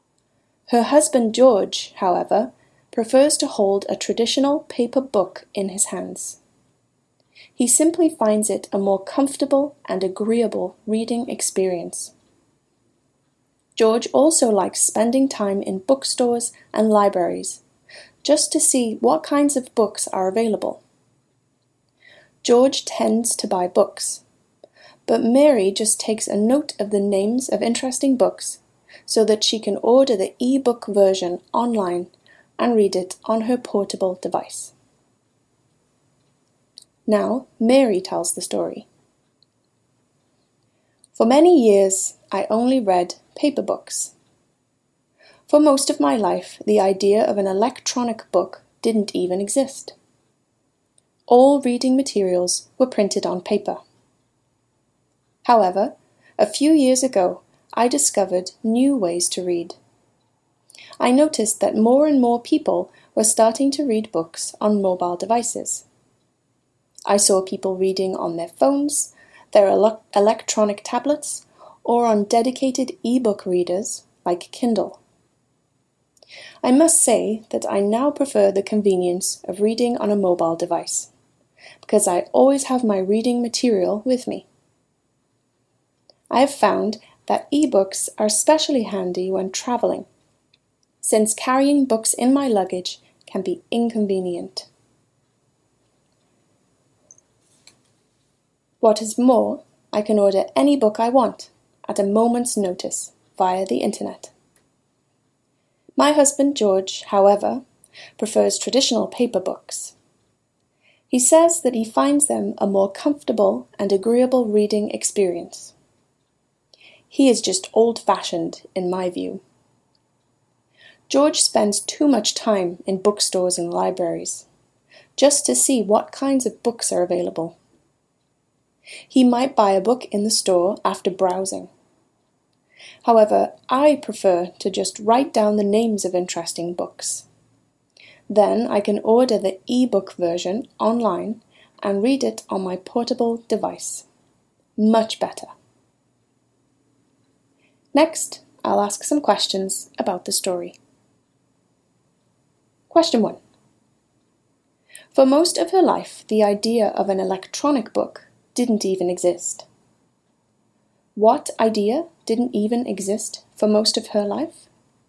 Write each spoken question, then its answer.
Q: What idea didn't even exist for most of her life?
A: The idea of an electronic book didn't even exist for most of her life.